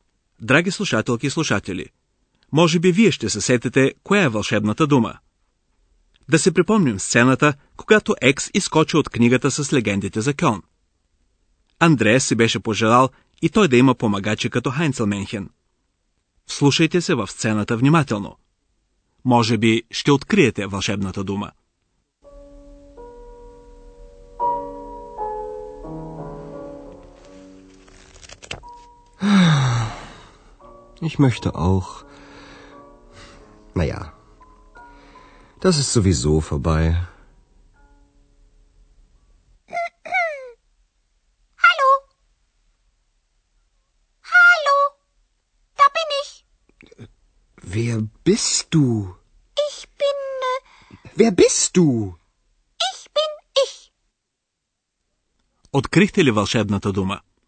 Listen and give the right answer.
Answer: Вълшебната дума гласи. Sowieso.